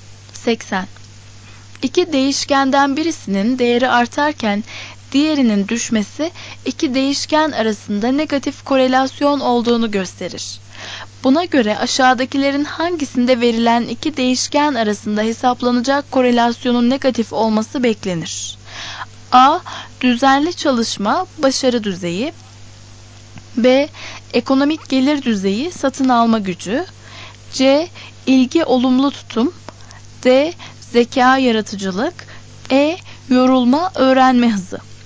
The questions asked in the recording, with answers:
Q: Buna göre aşağıdakilerin hangisinde verilen iki değişken arasında hesaplanacak korelasyonun negatif olması beklenir?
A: Doğru cevap E.